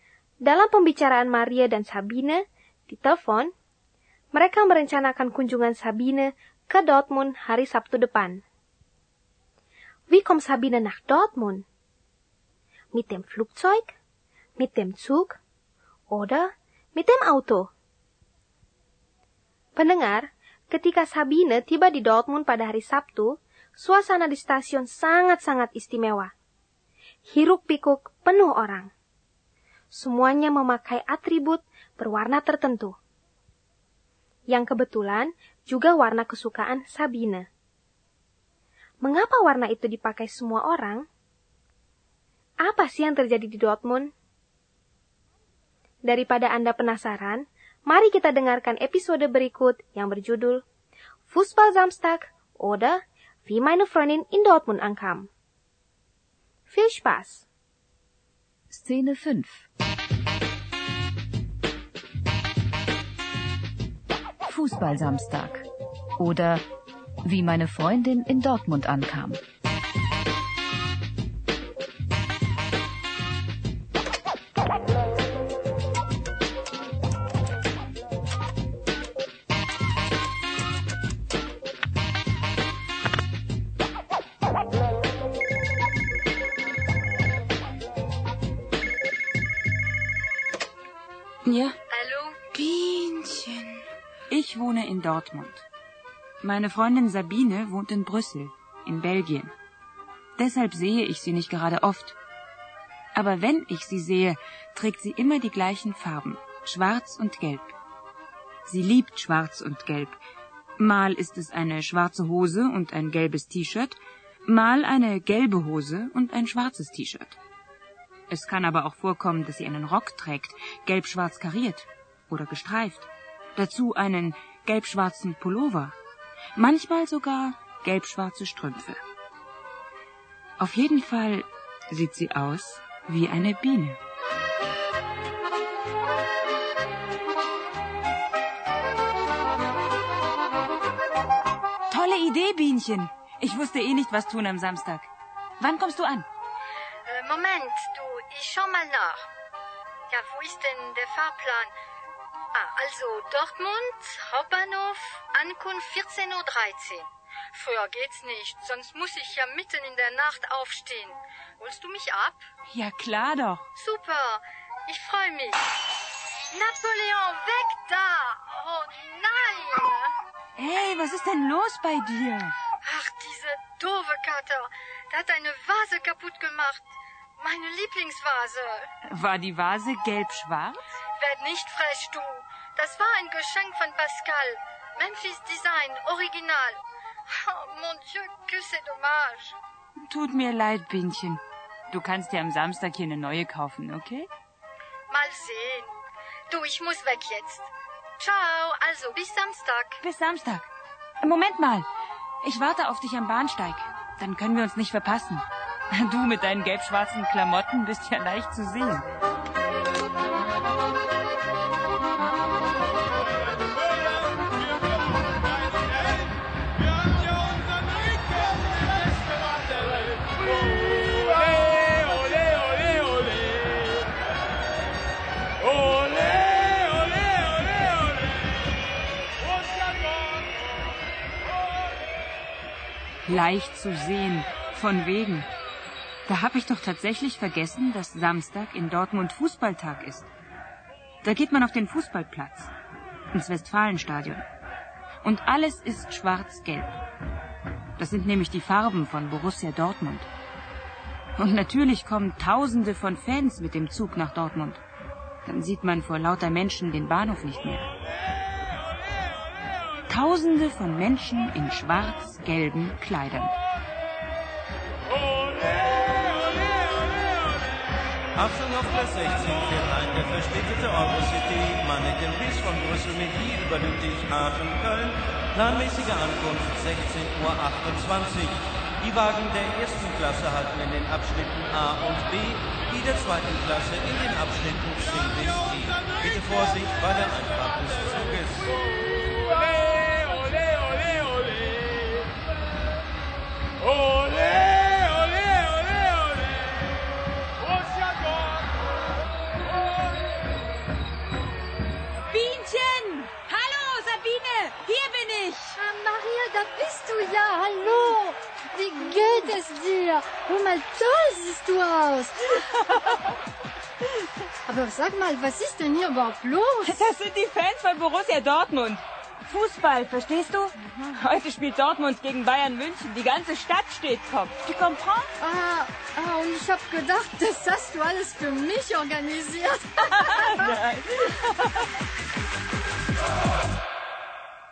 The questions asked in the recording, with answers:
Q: Wie kommt Sabine nach Dortmund?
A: Ya, Sabine fährt mit dem Zug und Maria holt sie am Bahnhof ab.